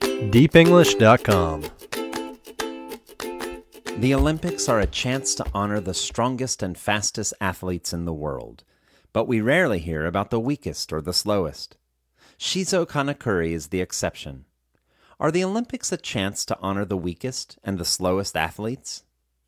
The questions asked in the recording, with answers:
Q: Are the Olympics a chance to honor the weakest and the slowest athletes?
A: No, the Olympics aren't a chance to honor the weakest and the slowest athletes.